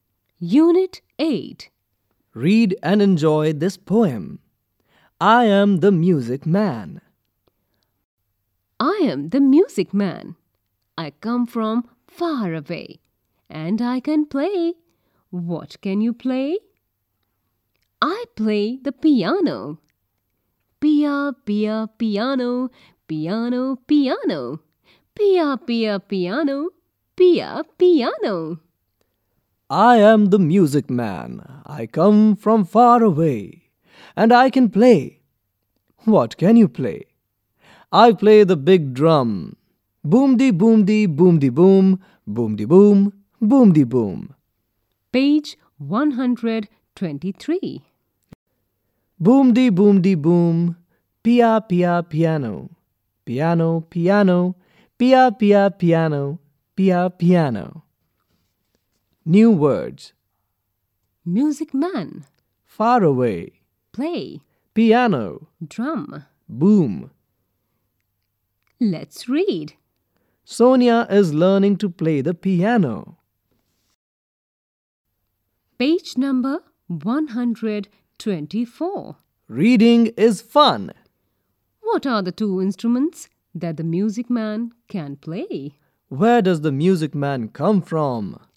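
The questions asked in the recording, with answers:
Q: What are the two instruments that the music man can play?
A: The piano and the big drum

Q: Where does the music man come from?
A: From far away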